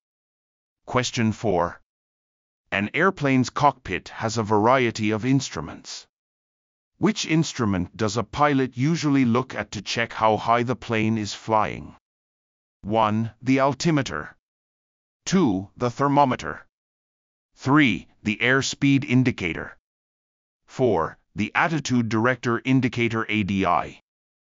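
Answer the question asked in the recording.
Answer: 1: The altimeter.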